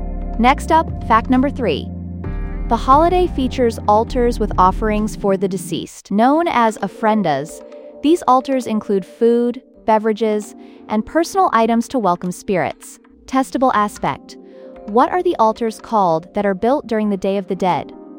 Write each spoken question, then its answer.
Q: What are the altars called that are built during the Day of the Dead?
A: Correct answer, ofrendas.